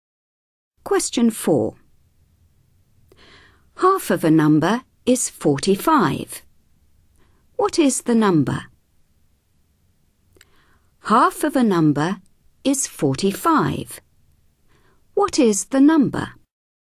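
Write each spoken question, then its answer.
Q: Half of a number is 45. What is the number?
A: 90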